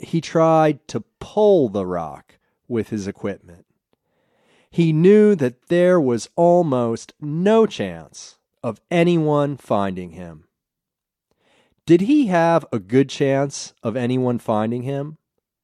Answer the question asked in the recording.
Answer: No, there was almost no chance of anyone finding him.